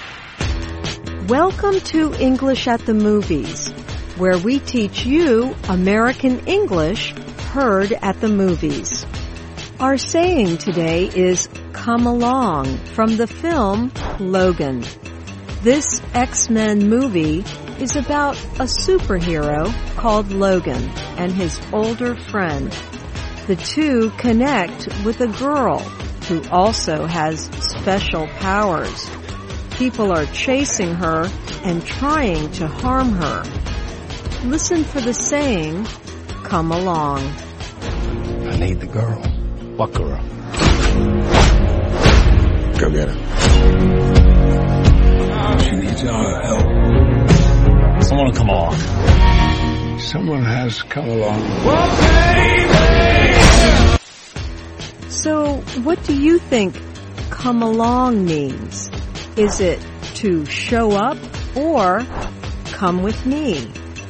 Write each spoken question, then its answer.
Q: So, what do you think come along means? Is it to show up or come with me?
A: But used this way in the movie, it means to show up.